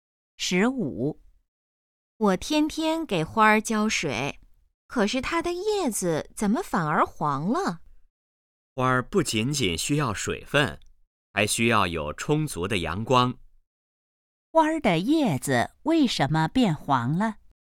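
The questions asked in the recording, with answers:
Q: 花儿的叶子为什么变黄了?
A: 缺少阳光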